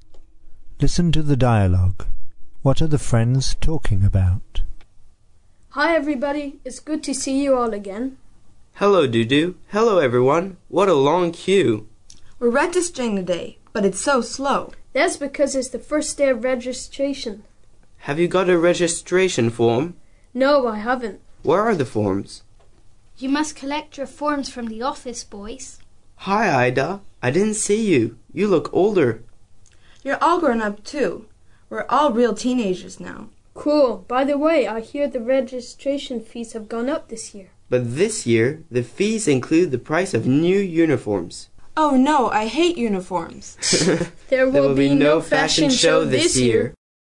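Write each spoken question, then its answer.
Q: What are the friends talking about?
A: School registration (forms, fees and uniforms) on the first day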